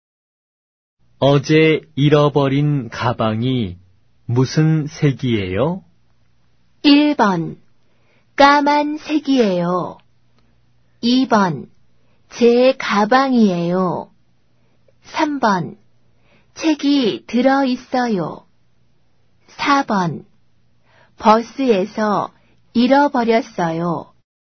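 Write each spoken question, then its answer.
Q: 어제 잃어버린 가방이 무슨 색이에요?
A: 1: 까만색이에요.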